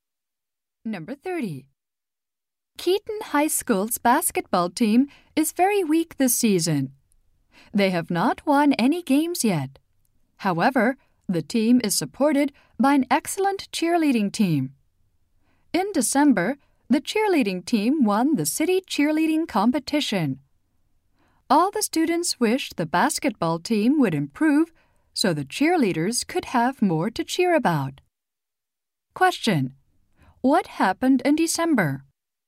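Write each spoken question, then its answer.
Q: What happened in December?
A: The cheerleading team won the city competition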